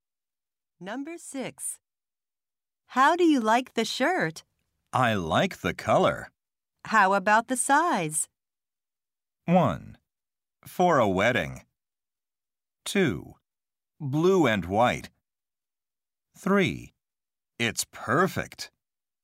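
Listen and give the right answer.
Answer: 3: It's perfect.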